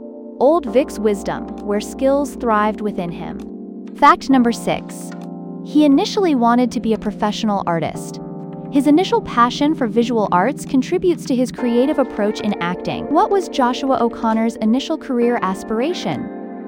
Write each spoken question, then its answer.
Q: What was Joshua O'Connor's initial career aspiration?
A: professional artist.